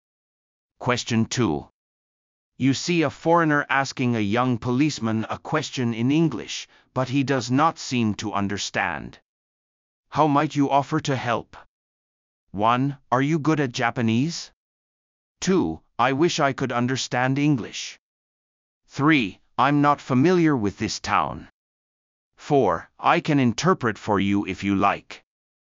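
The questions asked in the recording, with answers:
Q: How might you offer to help?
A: 4: I can interpret for you if you like.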